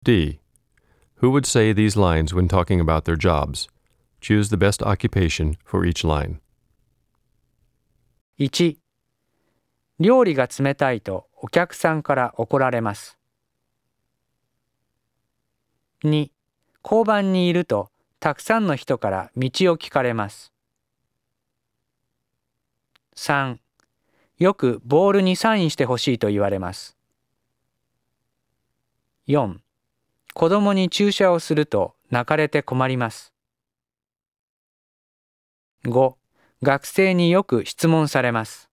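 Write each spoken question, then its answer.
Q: 交番にいるとたくさんの人から道を聞かれます。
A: 警察官

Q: 学生によく質問されます。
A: 先生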